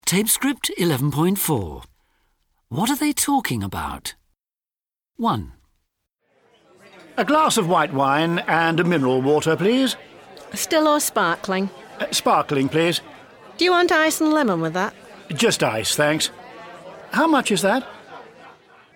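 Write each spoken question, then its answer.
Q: What are they talking about?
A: ordering drinks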